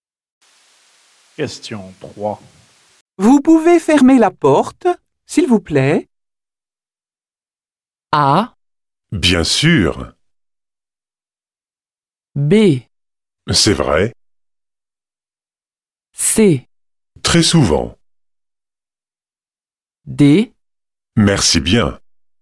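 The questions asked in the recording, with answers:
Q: Vous pouvez fermer la porte, s'il vous plaît?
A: A: Bien sûr.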